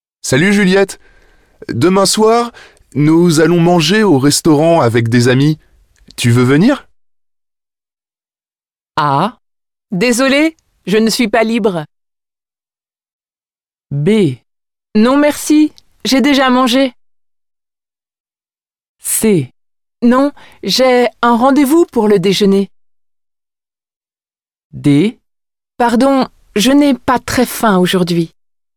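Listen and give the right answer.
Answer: A: Désolée, je ne suis pas libre.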